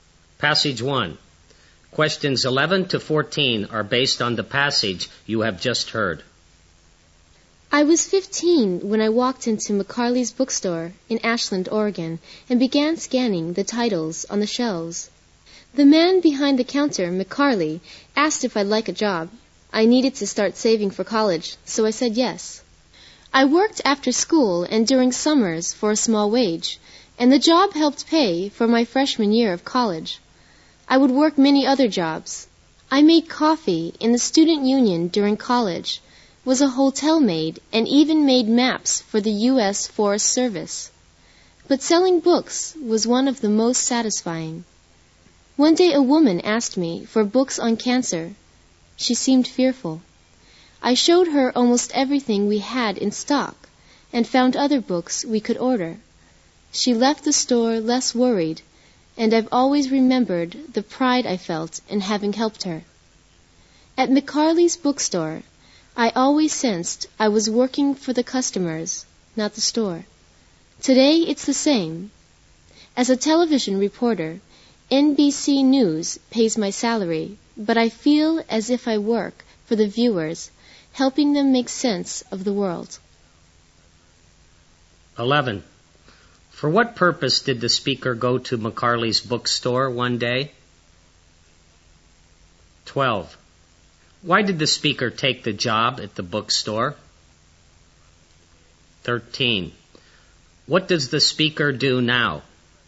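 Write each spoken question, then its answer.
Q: Why did the speaker take the job at the bookstore?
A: To save money for college

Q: What does the speaker do now?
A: She is a television reporter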